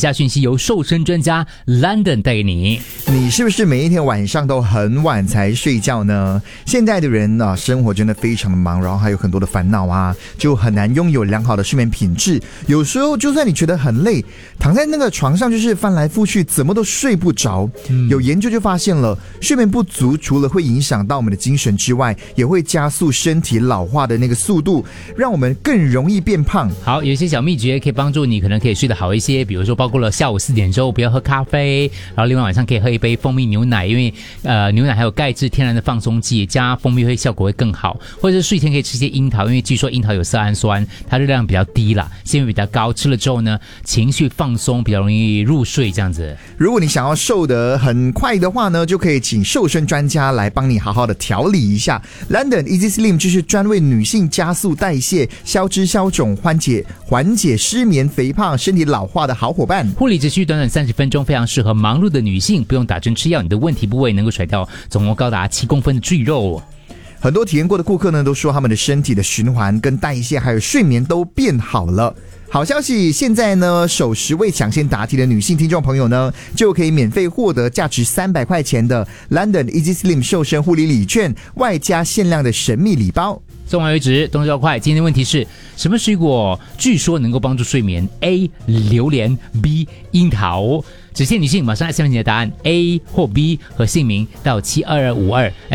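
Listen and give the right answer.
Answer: B: 樱桃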